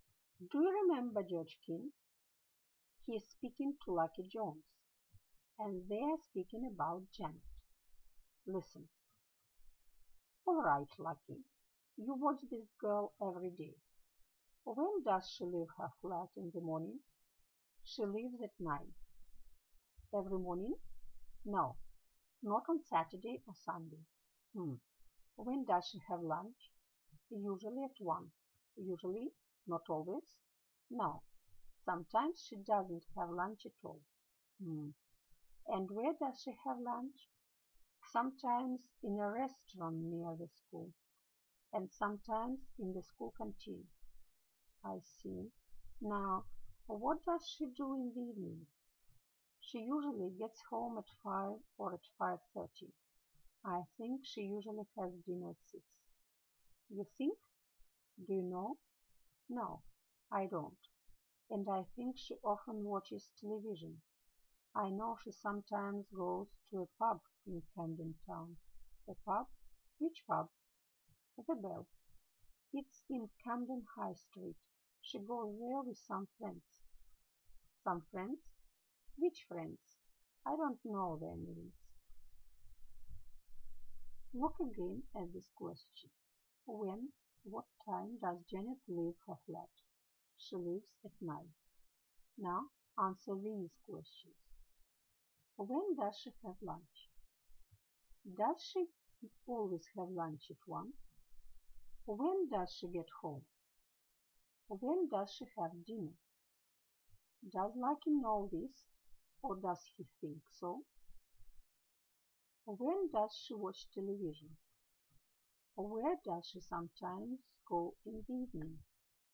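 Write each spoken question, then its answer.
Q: When does she have lunch?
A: Usually at 1

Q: Does she always have lunch at 1?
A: No, sometimes she doesn't have lunch at all

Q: When does she get home?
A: Usually at 5 or 5:30

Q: When does she have dinner?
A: Usually at 6

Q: Does Lucky know this, or does he think so?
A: He thinks so

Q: When does she watch television?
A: Often in the evening

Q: Where does she sometimes go in the evening?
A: To a pub, The Bell, in Camden Town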